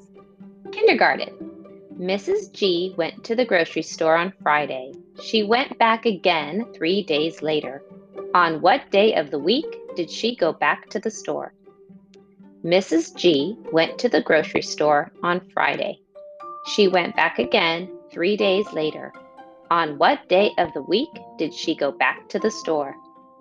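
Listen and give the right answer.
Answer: Monday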